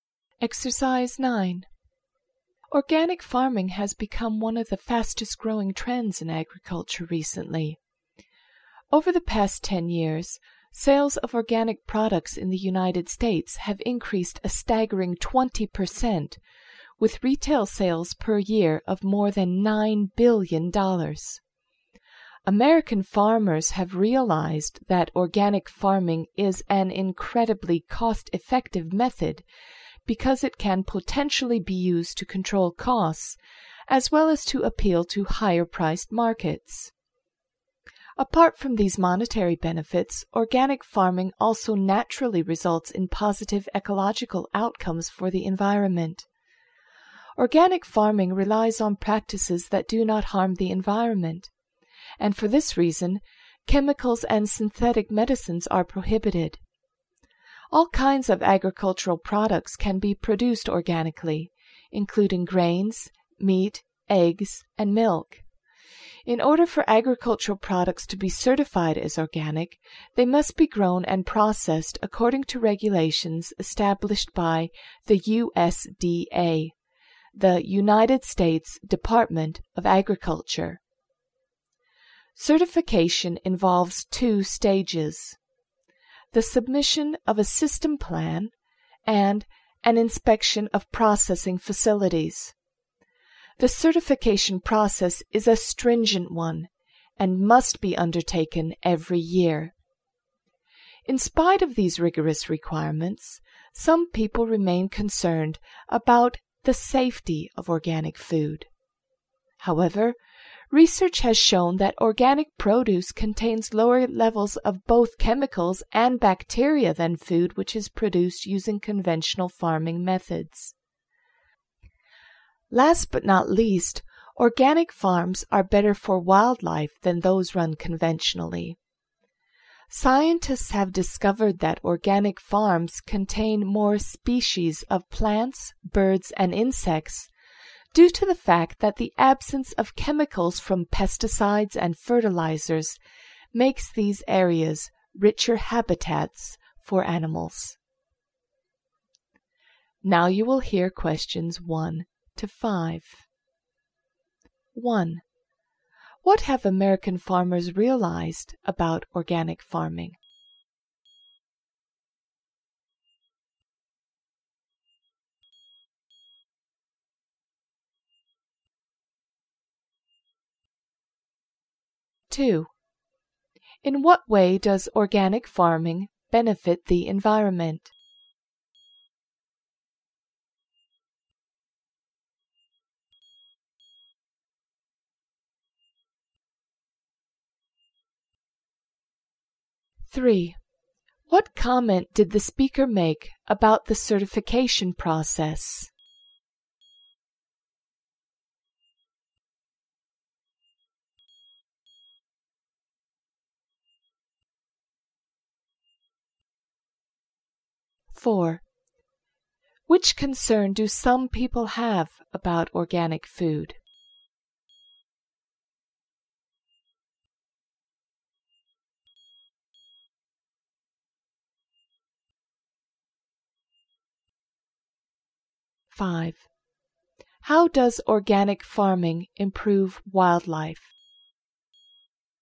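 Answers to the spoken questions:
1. It is very cost-effective: it can control costs and appeal to higher-priced markets
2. It uses practices that do not harm the environment; chemicals and synthetic medicines are prohibited
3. It is stringent and must be done every year
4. Its safety
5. With no chemical pesticides or fertilizers, the farms are richer habitats with more species of plants, birds and insects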